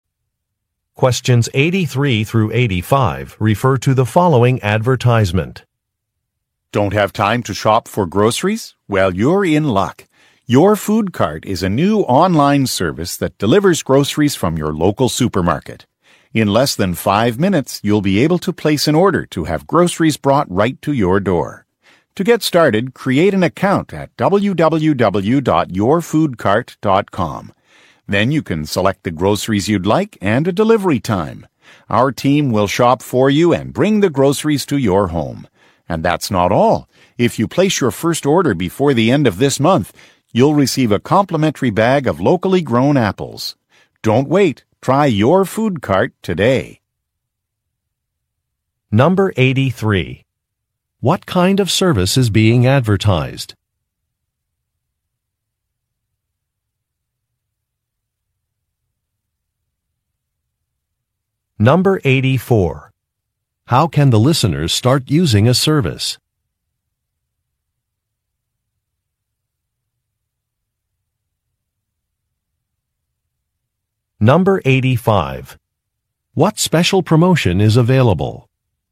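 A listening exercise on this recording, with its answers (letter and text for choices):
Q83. What kind of service is being advertised?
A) Office cleaning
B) Tailoring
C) Grocery delivery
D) Landscaping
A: C) Grocery delivery

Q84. How can the listeners start using a service?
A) By visiting a local shop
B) By scheduling a consultation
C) By calling a telephone number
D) By creating an account online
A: D) By creating an account online

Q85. What special promotion is available?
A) A free gift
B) A money-back guarantee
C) A membership upgrade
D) A personalized price quote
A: A) A free gift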